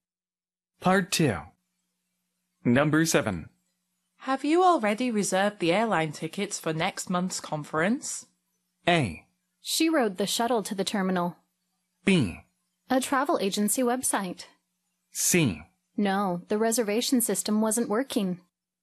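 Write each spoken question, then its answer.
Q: Have you already reserved the airline tickets for next month's conference?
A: C: No, the reservation system wasn't working.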